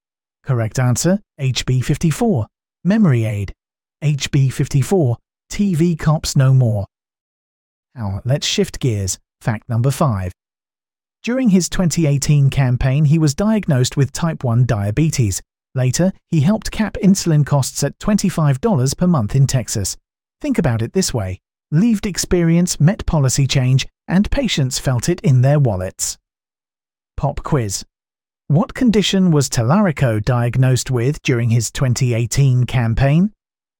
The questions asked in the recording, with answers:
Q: What condition was Tallarico diagnosed with during his 2018 campaign?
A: Correct answer, type 1 diabetes.